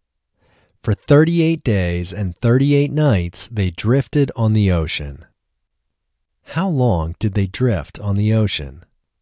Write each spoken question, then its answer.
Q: How long did they drift on the ocean?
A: They drifted on the ocean for 38 days and 38 nights.